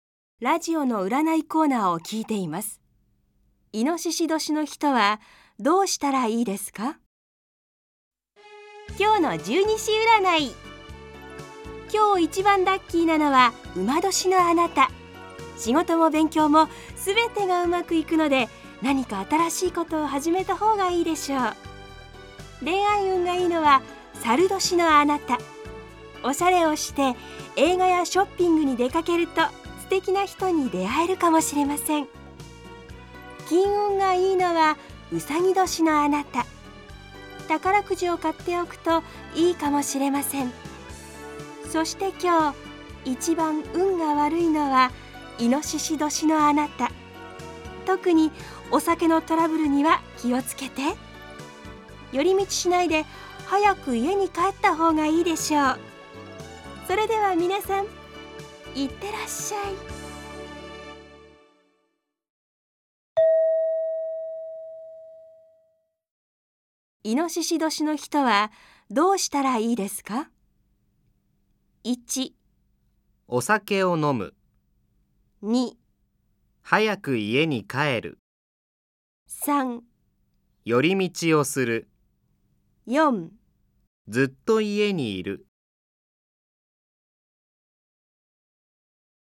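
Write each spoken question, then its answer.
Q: イノシシ年の人はどうしたらいいですか?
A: 2: 早く家に帰る。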